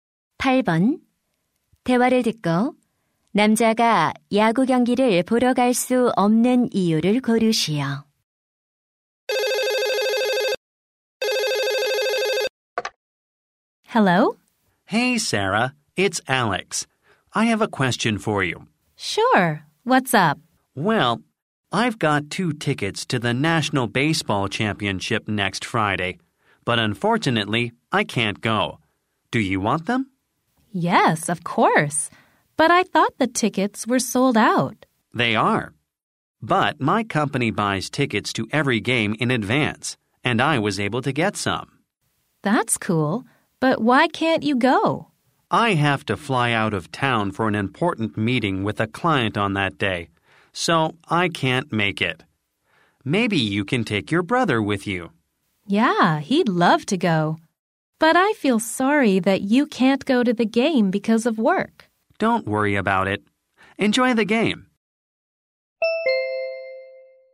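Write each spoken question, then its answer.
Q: 대화를 듣고 남자가 야구 경기를 보러 갈 수 없는 이유를 고르시오.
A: 고객과의 중요한 회의 때문에 출장을 가야 해서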